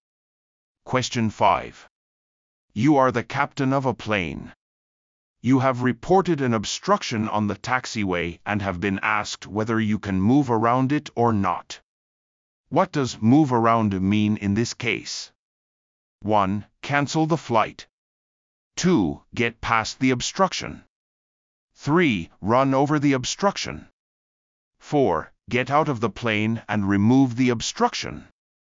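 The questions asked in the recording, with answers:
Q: What does move around mean in this case?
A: 2: Get past the obstruction.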